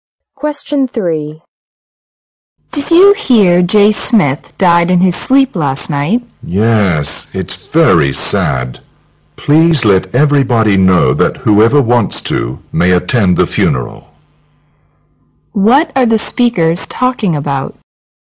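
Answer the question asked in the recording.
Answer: Jay Smith's death and funeral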